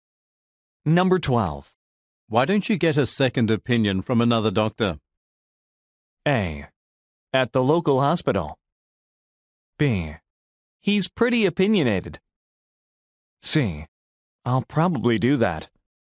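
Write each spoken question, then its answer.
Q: Why don't you get a second opinion from another doctor?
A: C: I'll probably do that.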